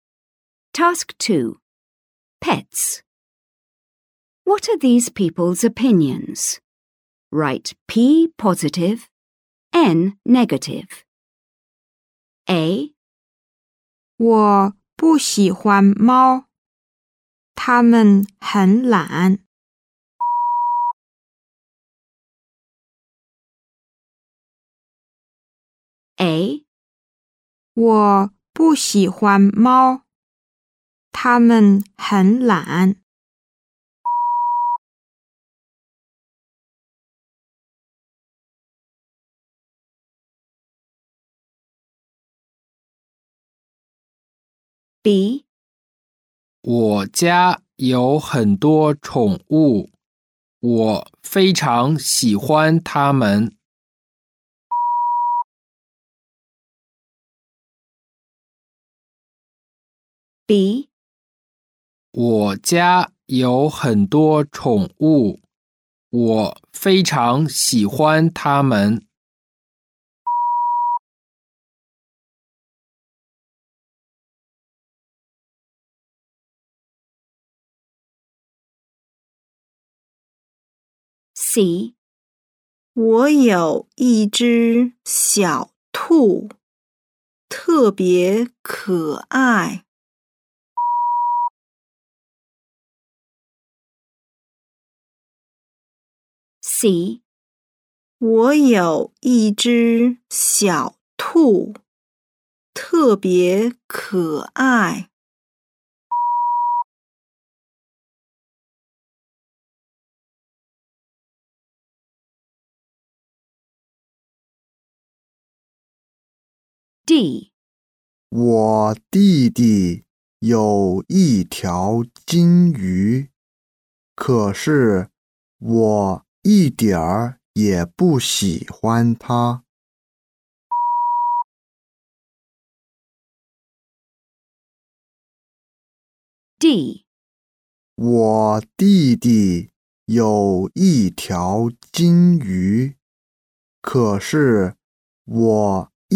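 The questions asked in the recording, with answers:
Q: What are these people's opinions?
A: N (negative)

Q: What are these people's opinions?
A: P (positive)

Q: What are these people's opinions?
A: P (positive)

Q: What are these people's opinions?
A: N (negative)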